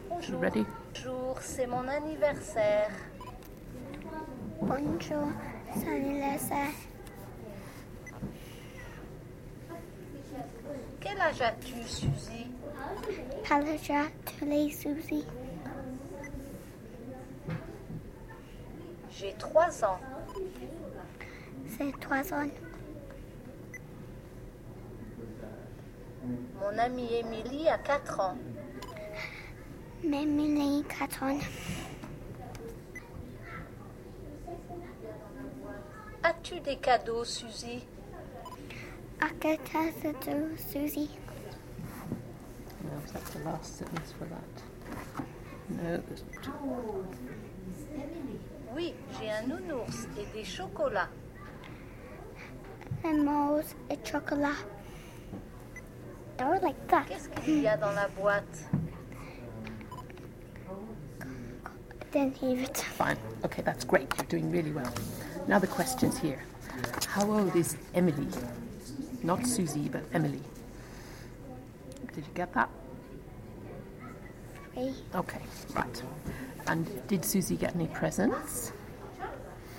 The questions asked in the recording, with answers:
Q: And did Susie get any presents?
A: She sure did, didn't she?